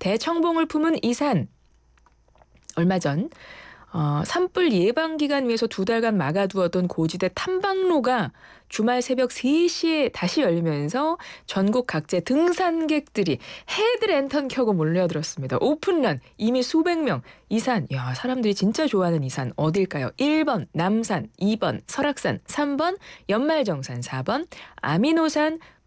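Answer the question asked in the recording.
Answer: 2: 설악산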